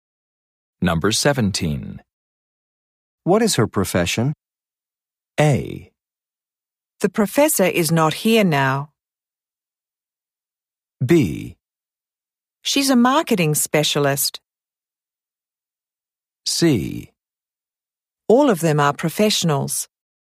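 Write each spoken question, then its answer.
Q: What is her profession?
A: B: She's a marketing specialist.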